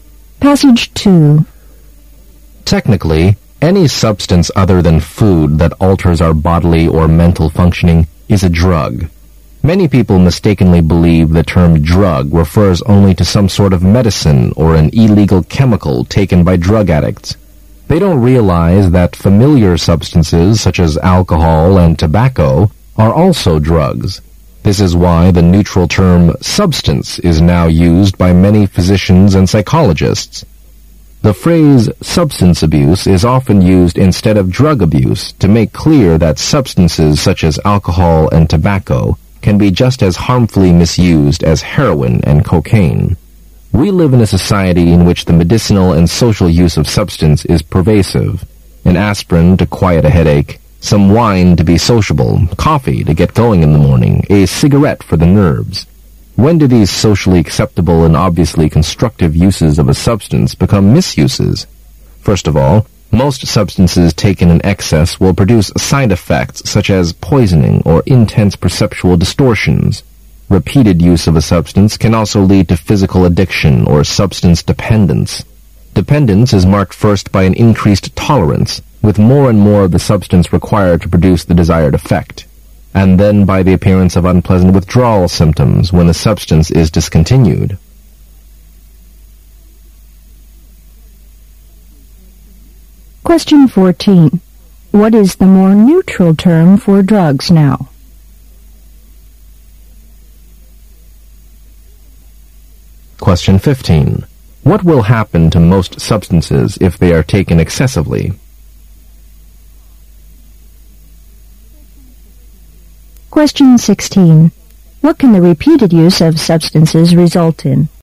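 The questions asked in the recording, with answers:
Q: What is the more neutral term for drugs now?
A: Substance

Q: What will happen to most substances if they are taken excessively?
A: They will produce side effects such as poisoning or intense perceptual distortions

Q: What can the repeated use of substances result in?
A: Physical addiction or substance dependence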